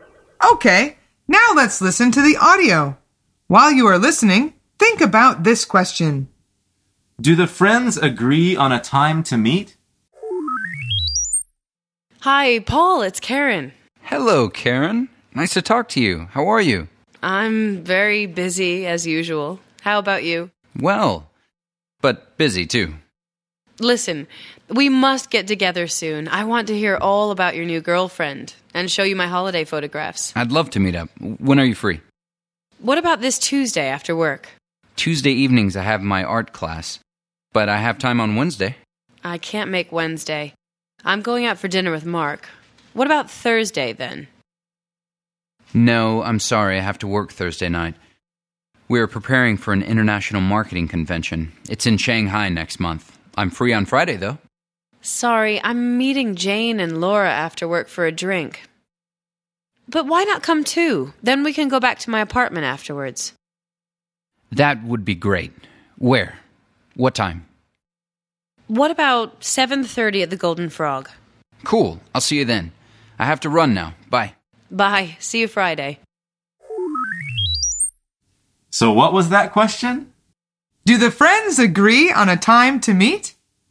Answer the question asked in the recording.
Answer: The answer is yes. They decide to meet on Friday.